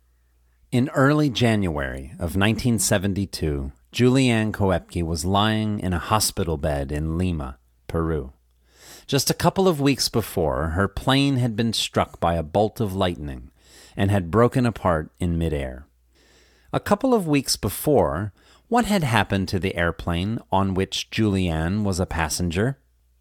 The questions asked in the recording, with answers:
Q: A couple of weeks before, what had happened to the airplane on which Julianne was a passenger?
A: Her plane had been struck by a bolt of lightning and had broken apart in midair.